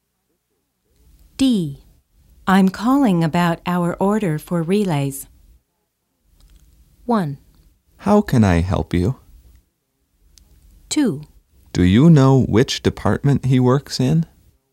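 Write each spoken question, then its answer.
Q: I'm calling about our order for relays.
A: 1: How can I help you?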